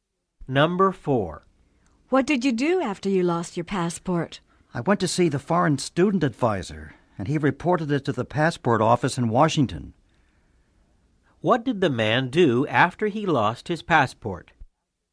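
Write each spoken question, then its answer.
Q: What did the man do after he lost his passport?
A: He went to see the foreign student advisor.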